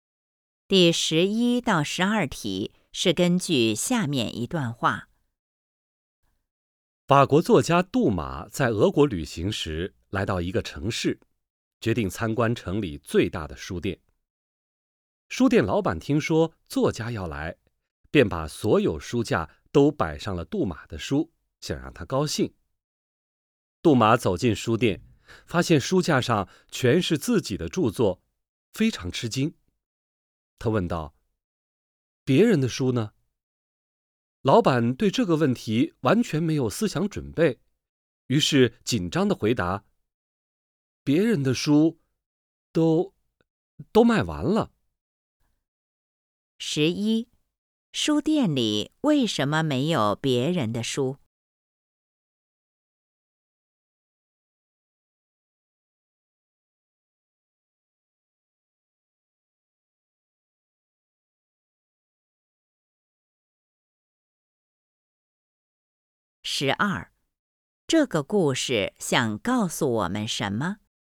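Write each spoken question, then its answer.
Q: 书店里为什么没有别人的书?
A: 老板为了让杜马高兴,把书架都摆上了杜马的书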